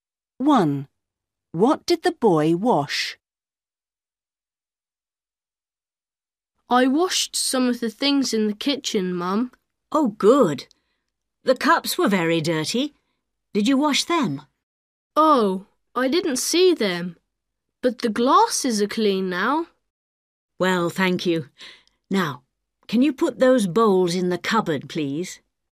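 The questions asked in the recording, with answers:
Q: What did the boy wash?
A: the glasses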